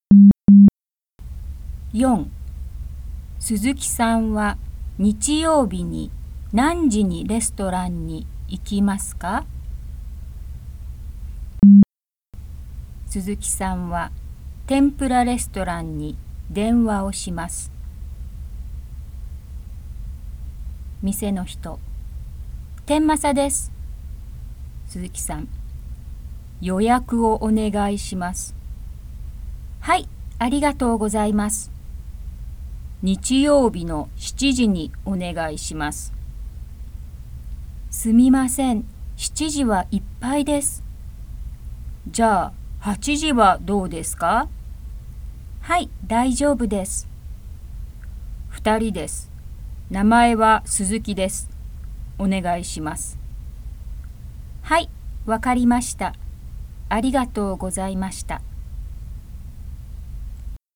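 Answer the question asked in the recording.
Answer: 8時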